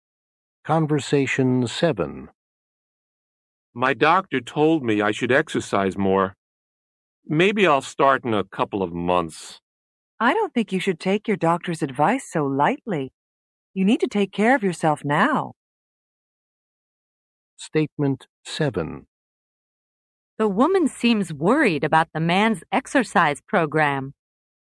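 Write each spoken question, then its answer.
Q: The woman seems worried about the man's exercise program.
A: True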